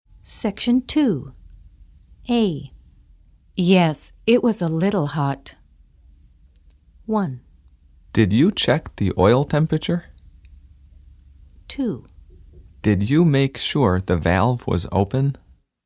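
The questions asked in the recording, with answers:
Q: Yes, it was a little hot.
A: 1: Did you check the oil temperature?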